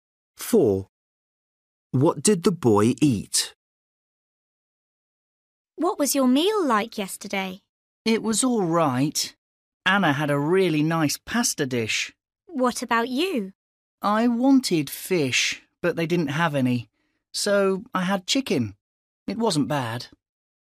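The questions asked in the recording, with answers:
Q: What did the boy eat?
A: Chicken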